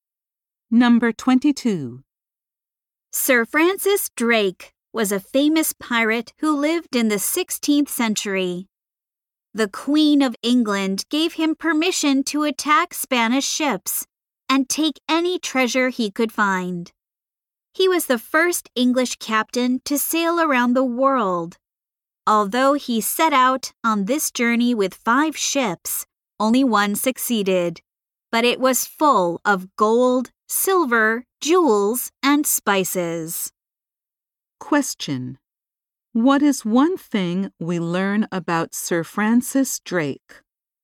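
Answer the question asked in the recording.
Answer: He was the first English captain to sail around the world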